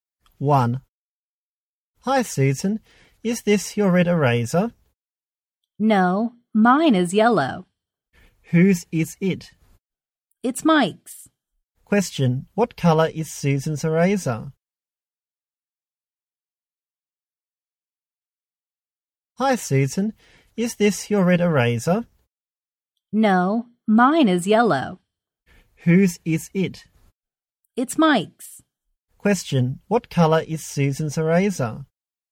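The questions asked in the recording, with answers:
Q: What color is Susan's eraser?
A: Yellow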